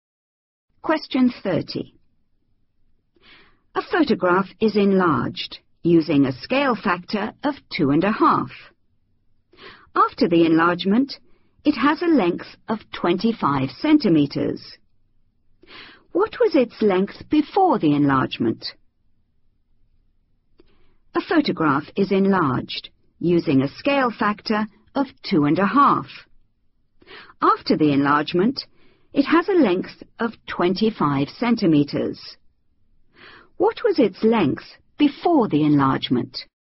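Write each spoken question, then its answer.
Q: What was its length before the enlargement?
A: 10 cm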